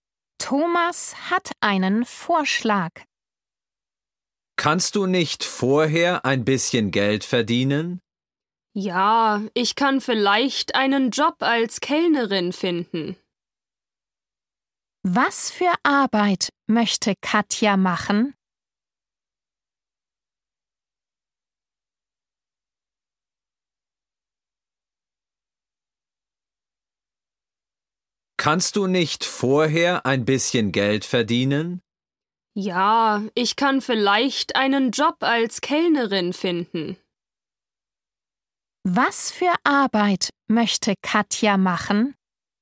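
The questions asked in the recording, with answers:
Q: Was für Arbeit möchte Katja machen?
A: Als Kellnerin arbeiten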